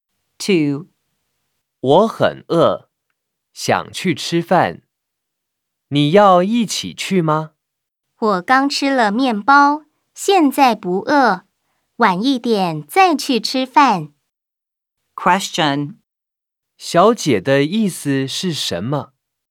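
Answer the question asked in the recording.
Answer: 她刚吃了面包,不饿,现在不去,晚一点再去吃饭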